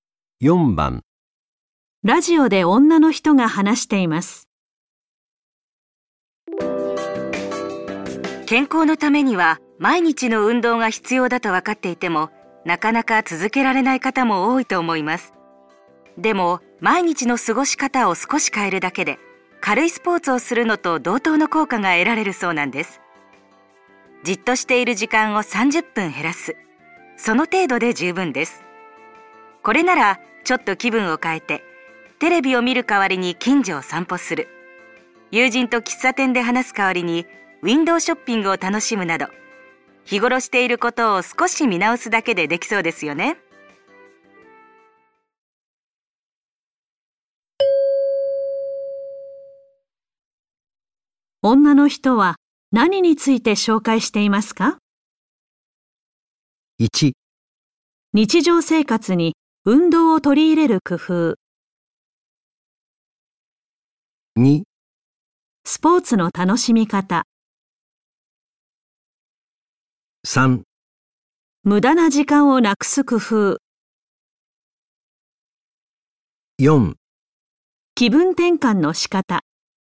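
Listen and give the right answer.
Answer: 1: 日常生活に運動を取り入れる工夫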